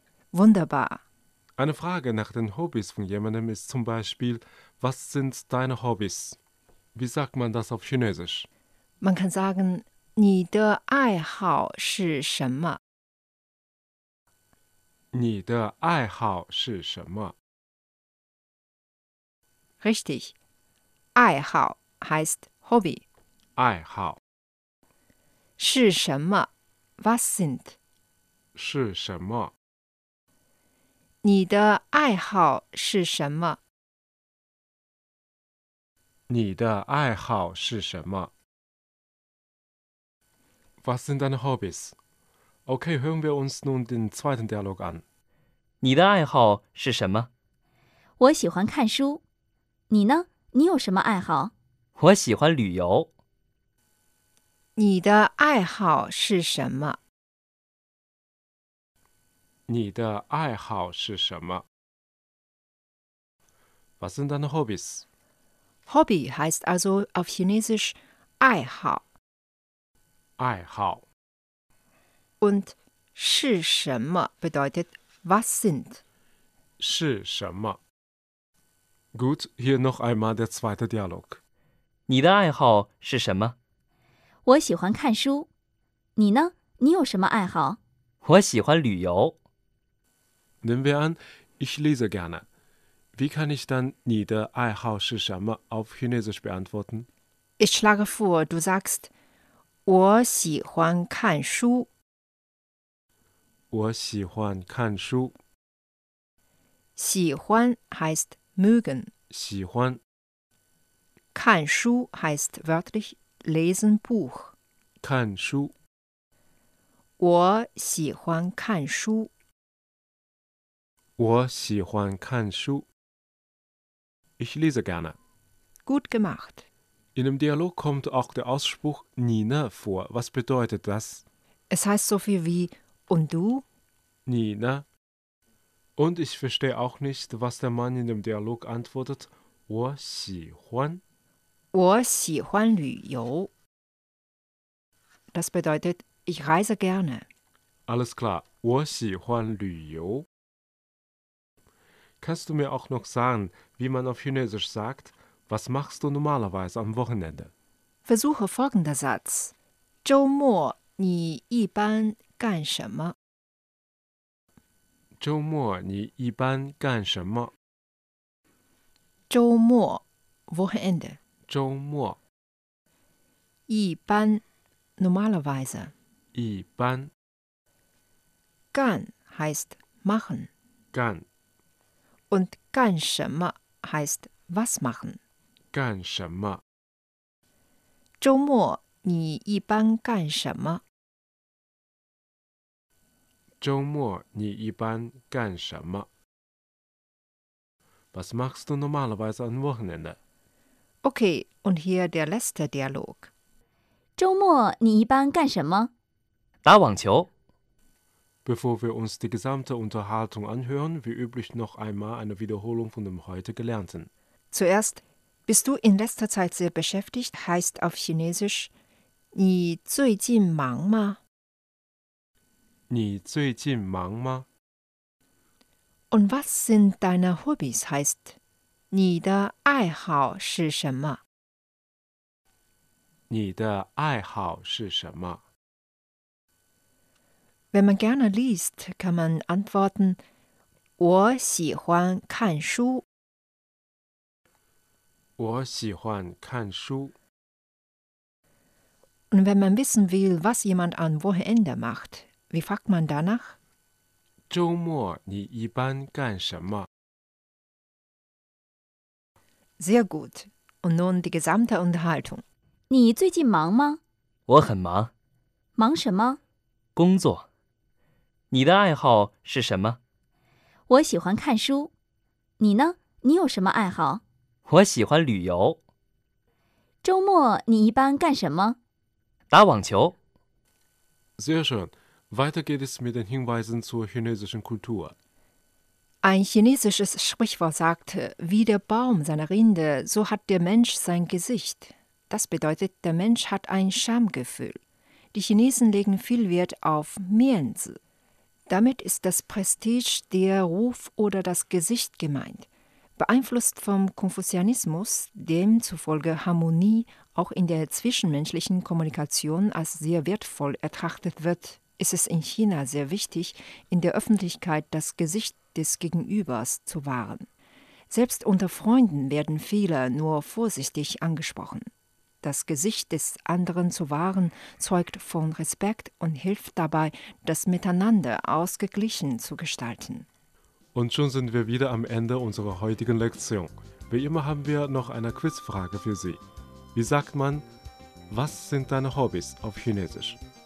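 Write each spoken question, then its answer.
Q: Wie sagt man, was sind deine Hobbys auf Chinesisch?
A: 你的爱好是什么?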